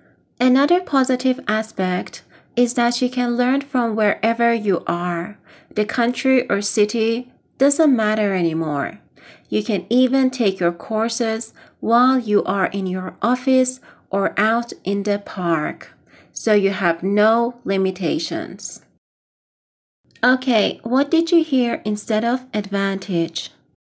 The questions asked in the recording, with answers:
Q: Okay, what did you hear instead of advantage?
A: That's right, positive aspect.